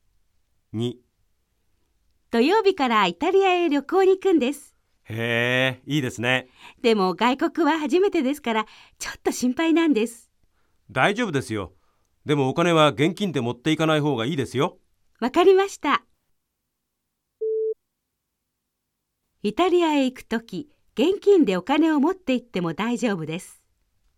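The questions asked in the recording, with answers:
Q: イタリアへ行くとき、現金でお金を持って行っても大丈夫です。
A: ×(正しくない)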